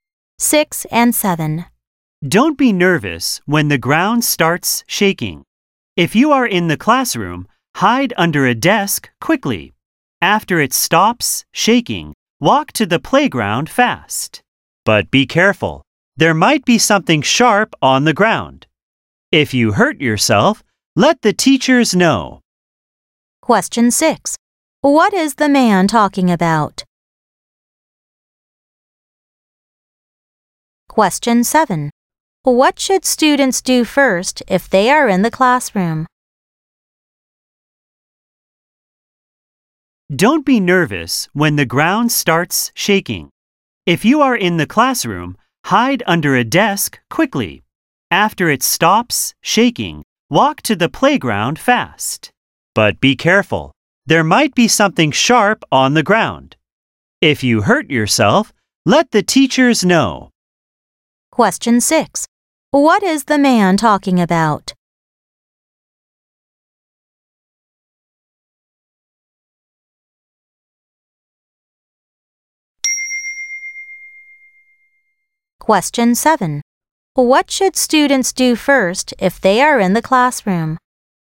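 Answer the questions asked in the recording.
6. What to do during an earthquake
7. Hide under a desk quickly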